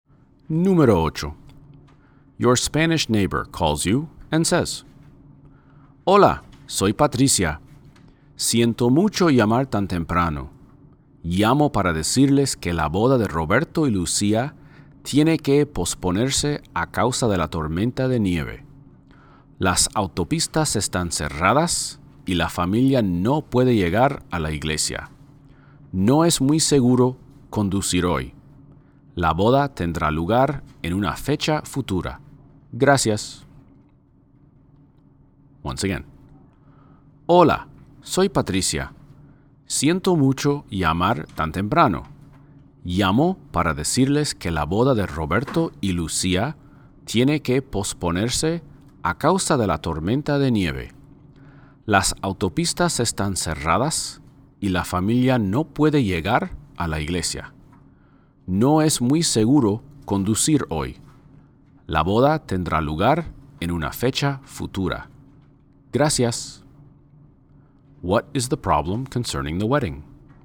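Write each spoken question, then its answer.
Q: What is the problem concerning the wedding?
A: It has to be postponed because of the snowstorm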